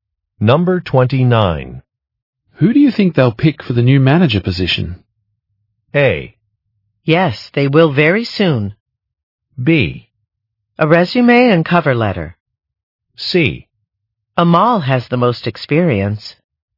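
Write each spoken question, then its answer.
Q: Who do you think they'll pick for the new manager position?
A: C: Amal has the most experience.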